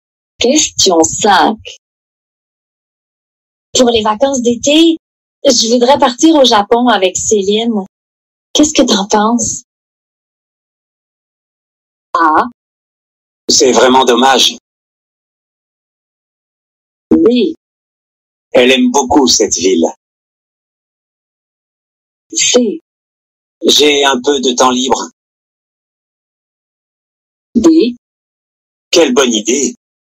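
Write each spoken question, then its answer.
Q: Pour les vacances d'été, je voudrais partir au Japon avec Céline. Qu'est-ce que t'en penses?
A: D: Quelle bonne idée!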